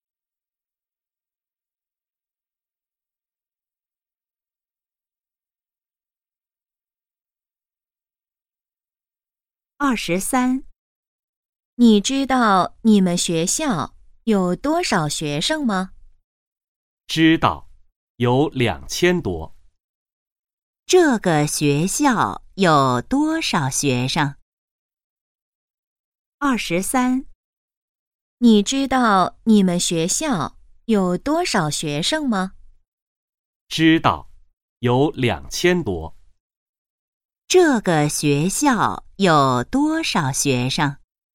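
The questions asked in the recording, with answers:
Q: 这个学校有多少学生?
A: 两千多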